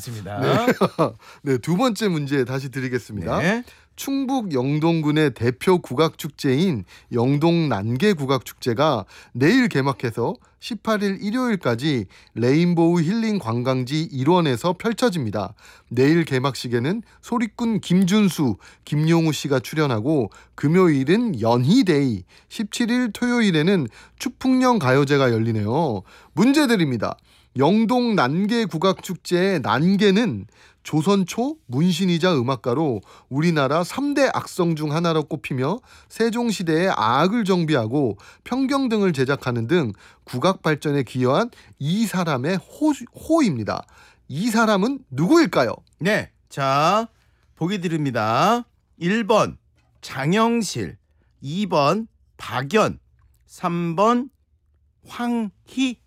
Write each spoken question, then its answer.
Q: 이 사람은 누구일까요?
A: 2번 박연.